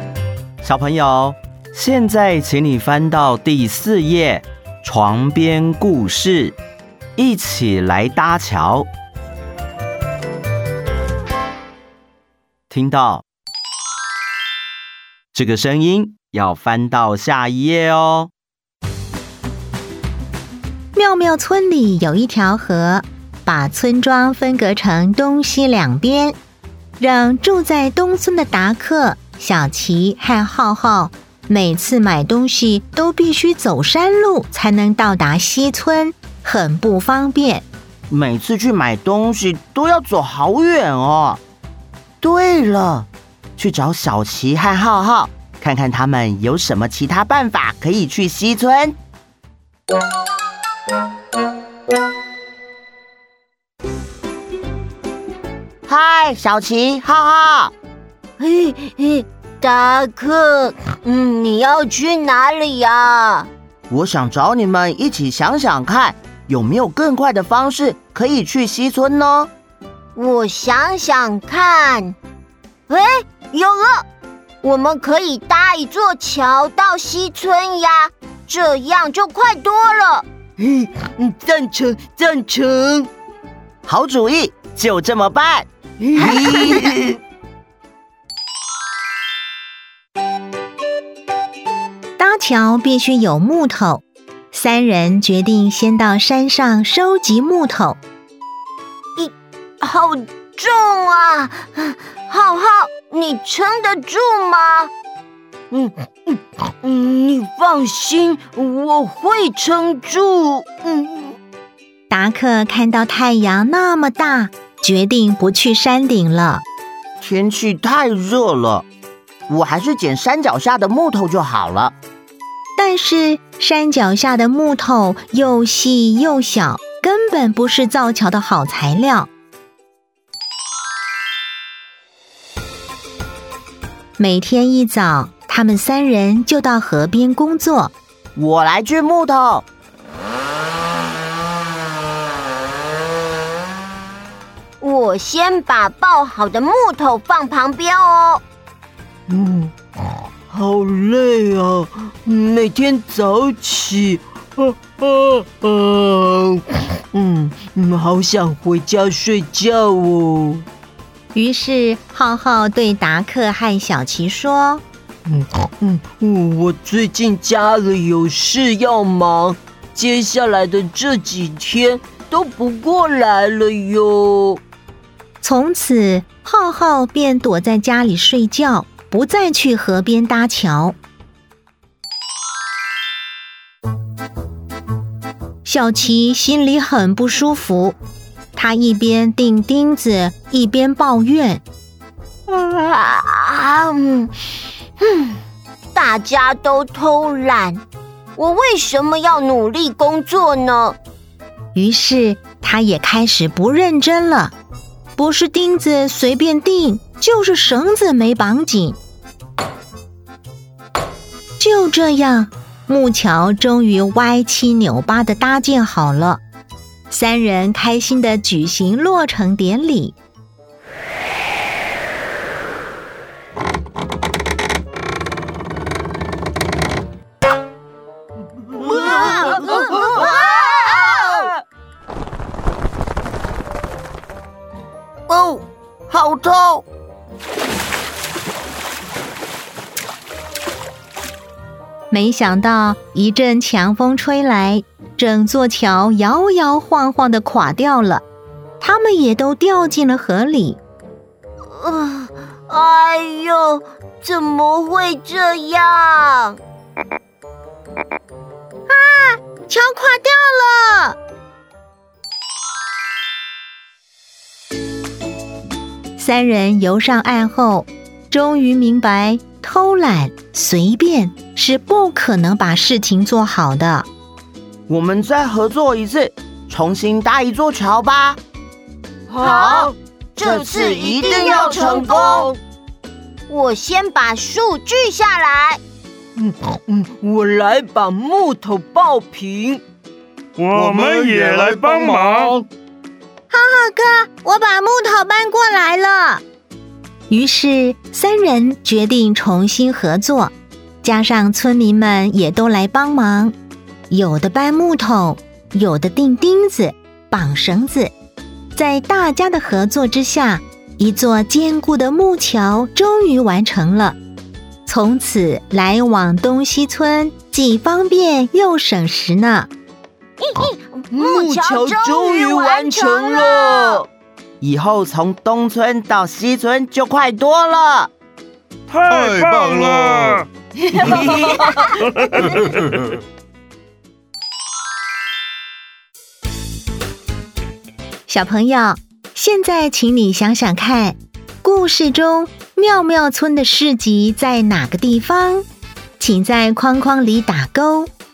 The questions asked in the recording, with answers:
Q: 故事中妙妙村的市集在哪个地方?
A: 西村。